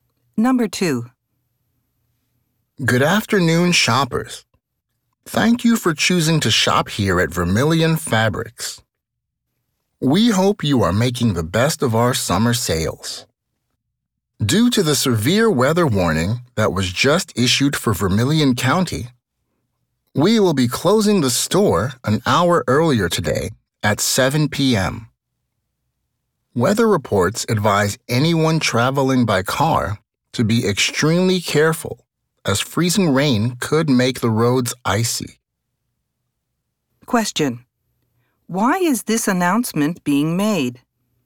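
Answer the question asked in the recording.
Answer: Because of a severe weather warning, the store will close an hour early (at 7 p.m.)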